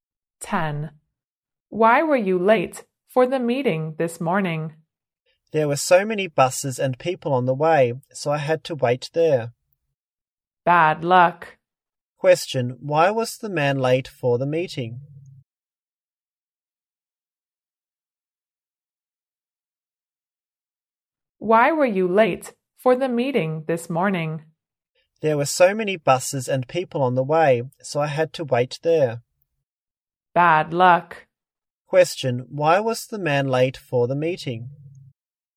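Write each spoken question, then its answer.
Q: why was the man late for the meeting?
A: The traffic was heavy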